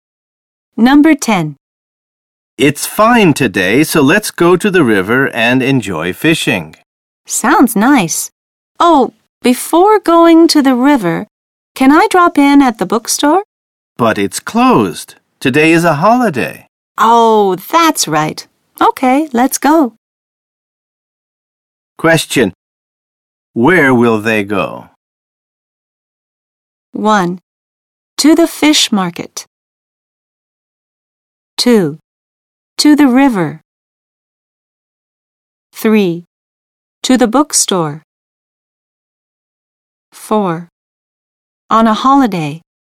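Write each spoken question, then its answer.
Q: Where will they go?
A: 2: To the river.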